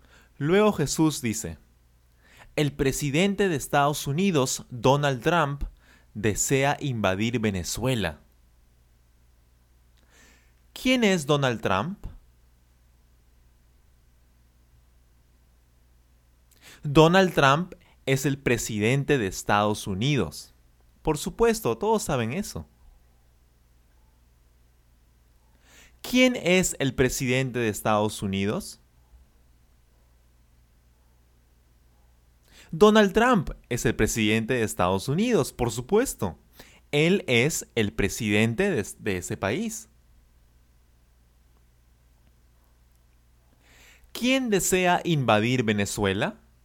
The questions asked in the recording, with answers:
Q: ¿Quién desea invadir Venezuela?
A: Donald Trump. Donald Trump desea invadir Venezuela.